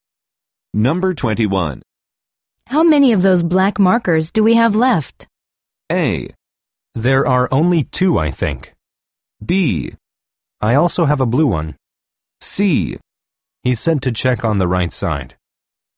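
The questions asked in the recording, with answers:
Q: How many of those black markers do we have left?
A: A: There are only two, I think.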